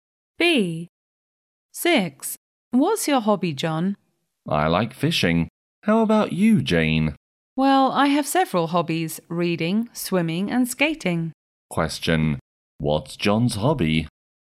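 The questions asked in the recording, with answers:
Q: What's John's hobby?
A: Fishing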